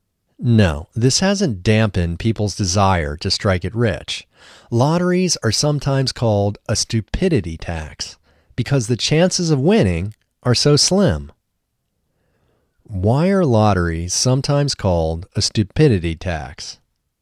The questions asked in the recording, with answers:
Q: Why are lotteries sometimes called a stupidity tax?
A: Lotteries are sometimes called a stupidity tax because the chances of winning are so slim.